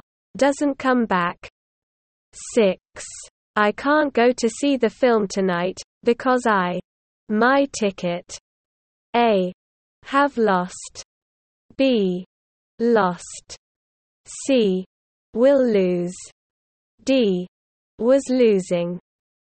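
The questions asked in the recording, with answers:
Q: I can't go to see the film tonight, because I. My ticket.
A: A: Have lost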